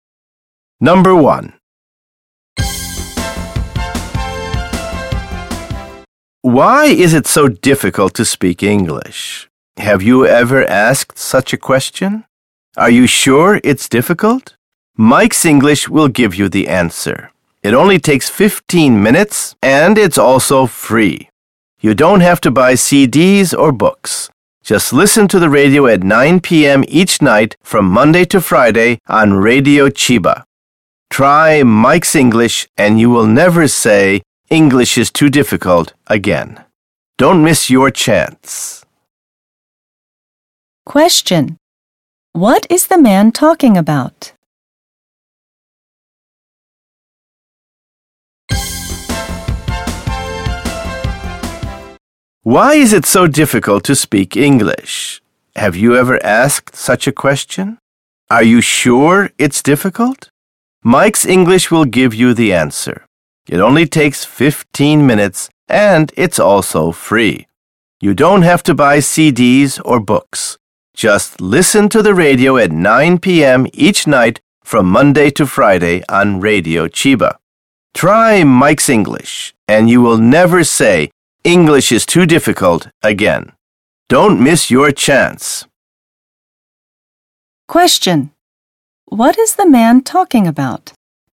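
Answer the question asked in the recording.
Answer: A free English radio program (Mike's English)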